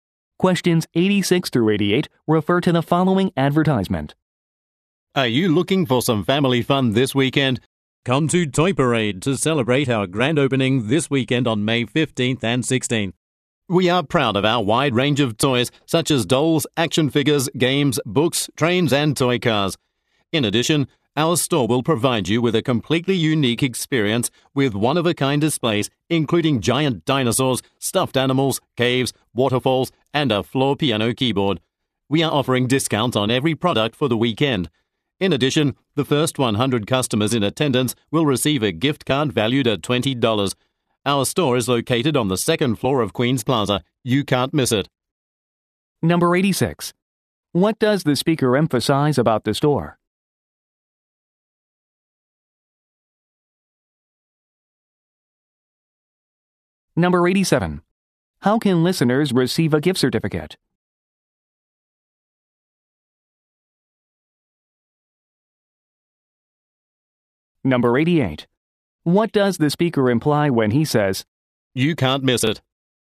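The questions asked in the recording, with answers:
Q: How can listeners receive a gift certificate?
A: By being among the first 100 customers

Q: What does the speaker imply when he says, You can't miss it?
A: The store is easy to find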